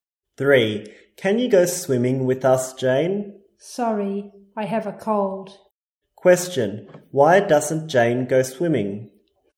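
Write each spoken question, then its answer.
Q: Question, why doesn't Jane go swimming?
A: She has a cold.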